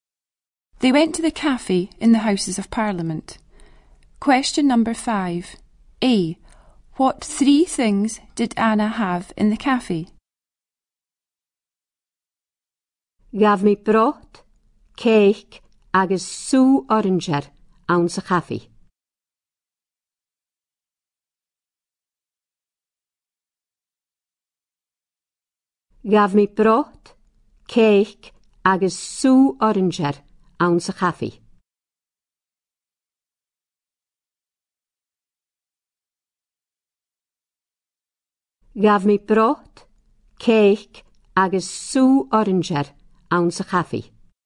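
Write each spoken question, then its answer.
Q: A. What 3 things did Anna have in the cafe?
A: soup, cake and orange juice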